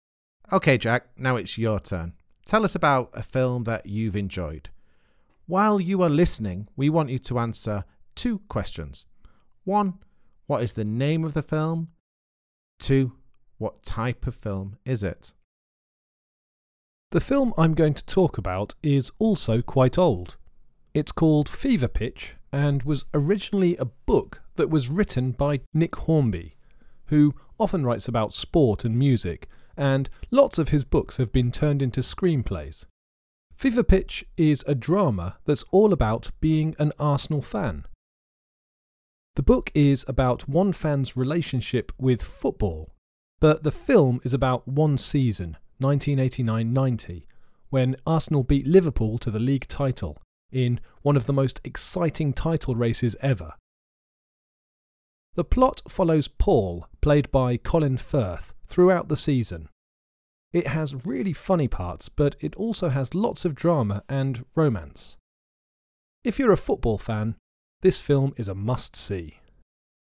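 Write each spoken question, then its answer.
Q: what is the name of the film?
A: Fever Pitch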